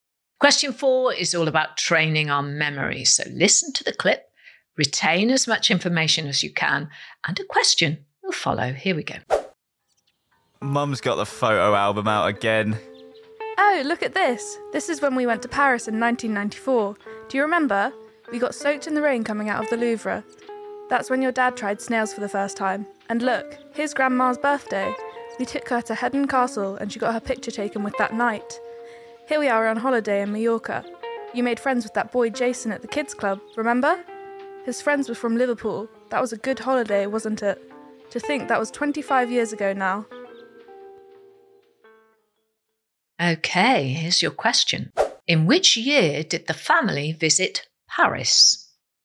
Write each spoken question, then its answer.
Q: In which year did the family visit Paris?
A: And the answer in the clip was they visited Paris in 1994.